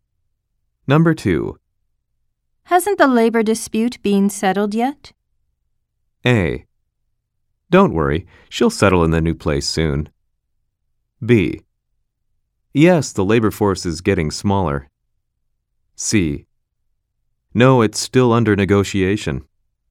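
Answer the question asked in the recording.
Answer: C: No, it's still under negotiation.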